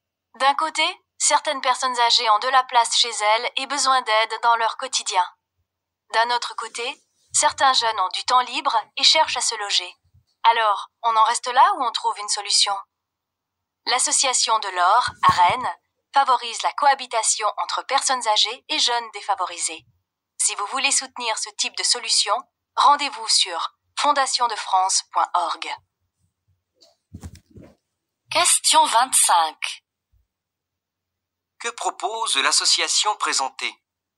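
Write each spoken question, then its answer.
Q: Que propose l'association présentée ?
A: Elle favorise la cohabitation entre personnes âgées et jeunes défavorisés.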